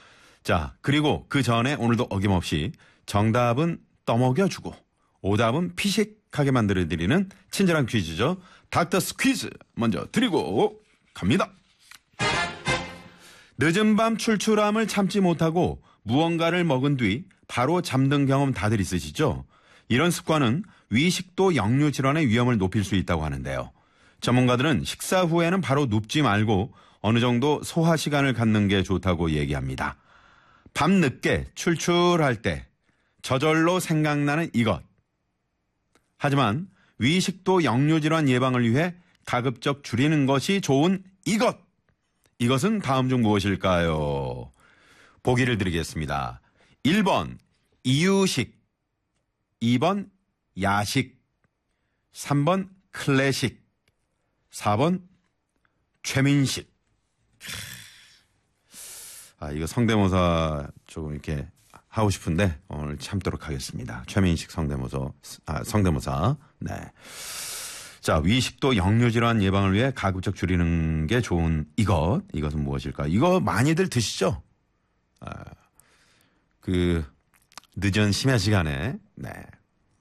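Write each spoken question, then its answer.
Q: 이것은 다음 중 무엇일까요?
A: 2번: 야식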